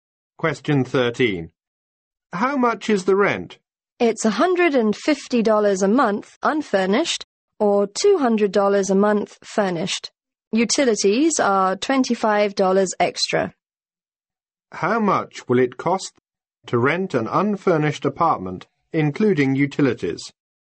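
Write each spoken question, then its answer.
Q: How much will it cost to rent an unfurnished apartment, including utilities?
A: $175 a month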